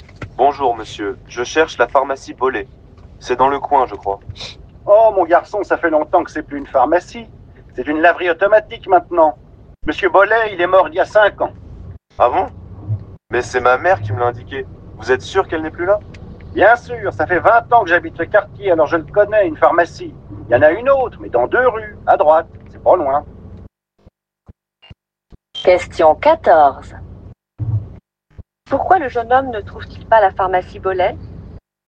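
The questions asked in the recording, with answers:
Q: Pourquoi le jeune homme ne trouve-t-il pas la pharmacie Bollé?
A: Parce qu'elle n'existe plus : c'est maintenant une laverie automatique.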